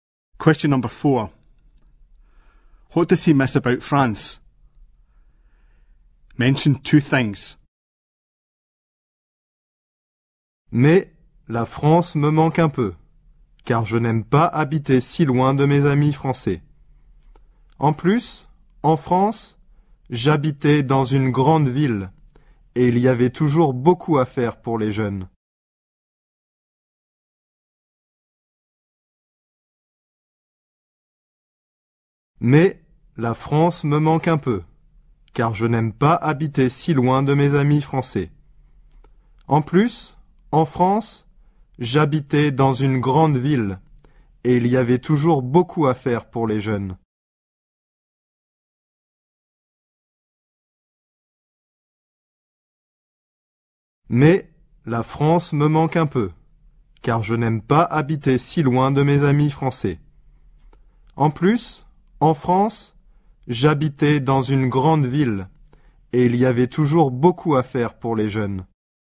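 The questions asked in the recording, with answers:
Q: What does he miss about France?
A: His French friends; living in a big city with lots for young people to do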